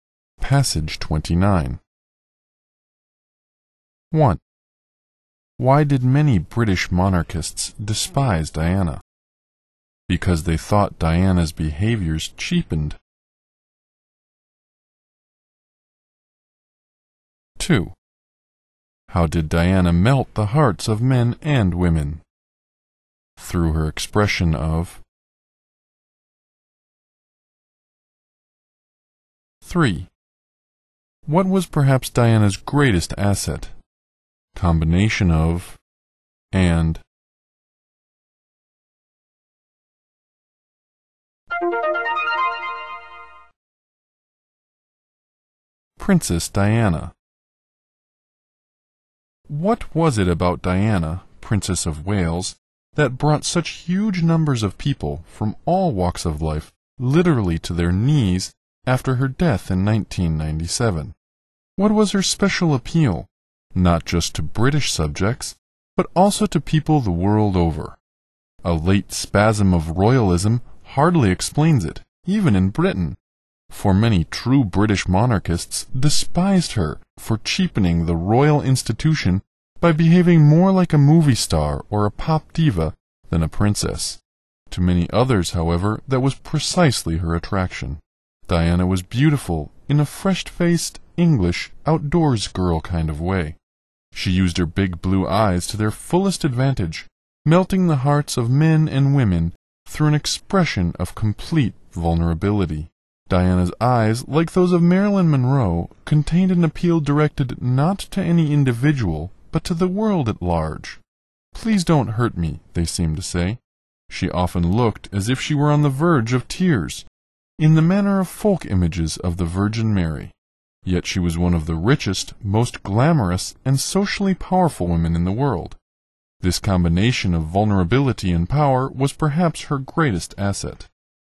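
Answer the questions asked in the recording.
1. Because she cheapened the royal institution by behaving like a movie star or pop diva
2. Through an expression of complete vulnerability
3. Combination of vulnerability and power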